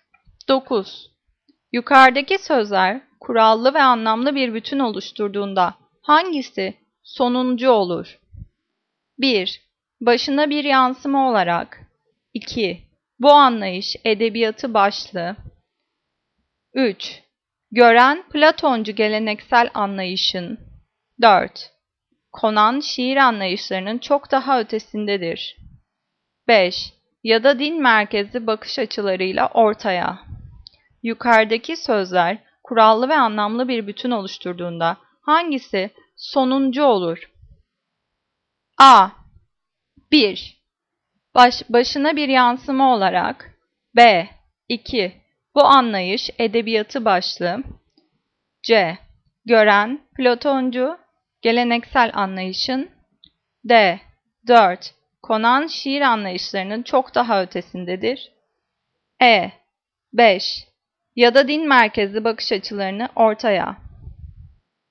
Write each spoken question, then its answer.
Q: Yukarıdaki sözler kurallı ve anlamlı bir bütün oluşturduğunda hangisi sonuncu olur?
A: Cevap D. 4. Konan şiir anlayışlarının çok daha ötesindedir.